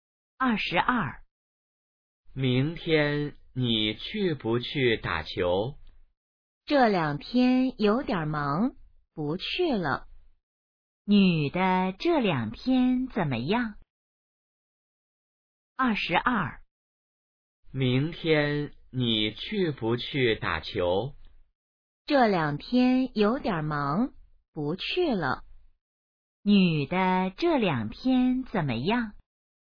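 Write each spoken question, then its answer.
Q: 女的这两天怎么样?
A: 有点忙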